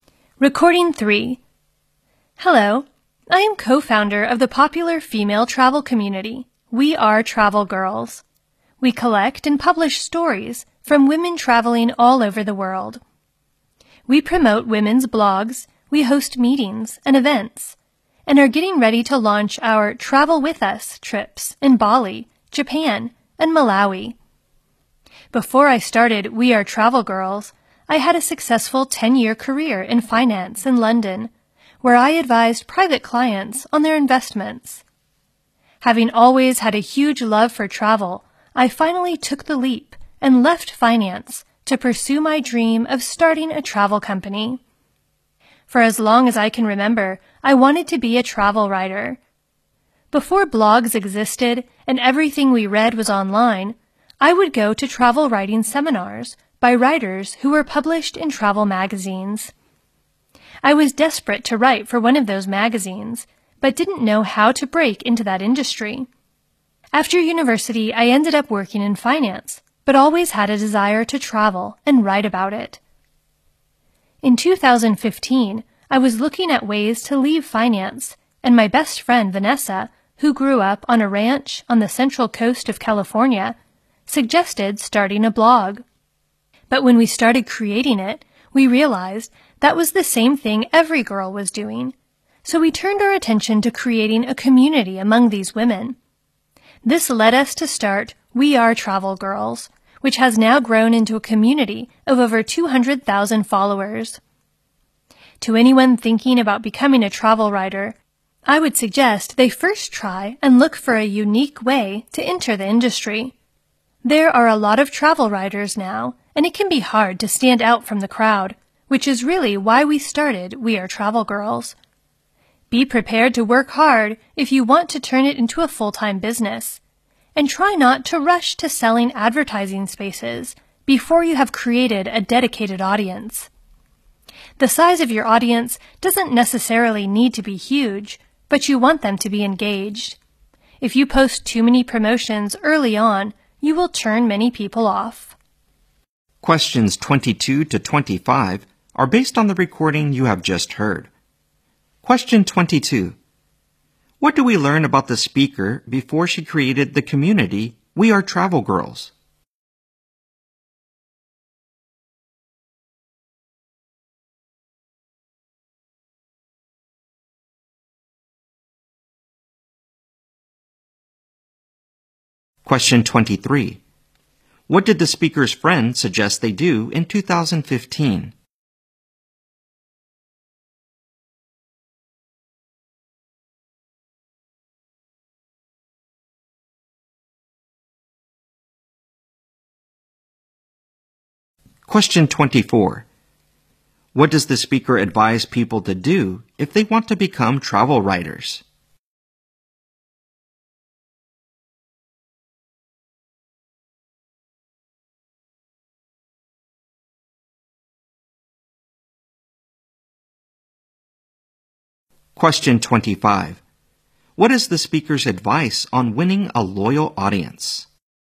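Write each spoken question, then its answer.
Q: What do we learn about the speaker before she created the community We Are Travel Girls?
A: She had a successful 10-year career in finance in London

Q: What did the speaker's friend suggest they do in 2015?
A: Start a blog

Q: What does the speaker advise people to do if they want to become travel writers?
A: Look for a unique way to enter the industry

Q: What is the speaker's advice on winning a loyal audience?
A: Don't rush to sell advertising or post too many promotions early on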